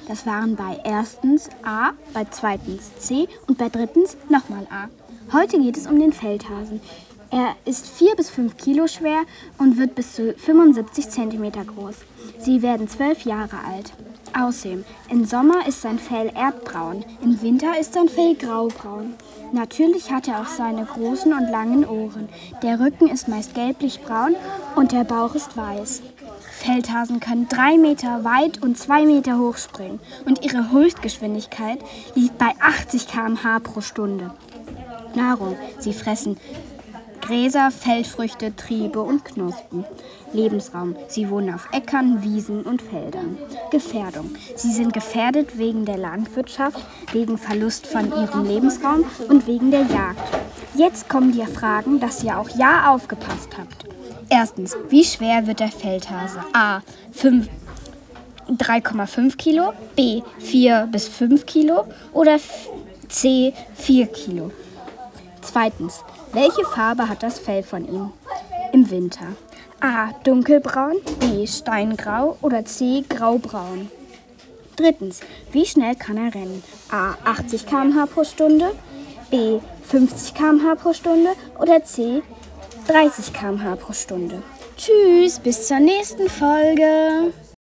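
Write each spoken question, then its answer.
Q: Erstens, wie schwer wird der Feldhase?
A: B: 4 bis 5 Kilo

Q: Zweitens, welche Farbe hat das Fell von ihm im Winter?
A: C: Graubraun

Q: Drittens, wie schnell kann er rennen?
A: A: 80 km/h pro Stunde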